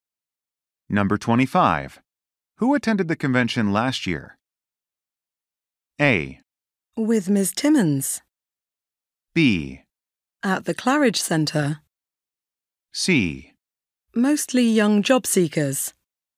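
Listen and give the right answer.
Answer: C: Mostly young job seekers.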